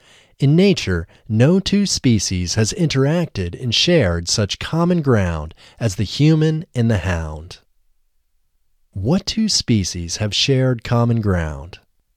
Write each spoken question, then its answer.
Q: What two species have shared common ground?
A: The human and the hound have shared common ground.